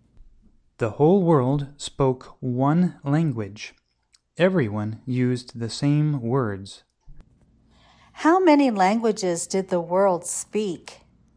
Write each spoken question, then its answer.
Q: How many languages did the world speak?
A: The world spoke only one language.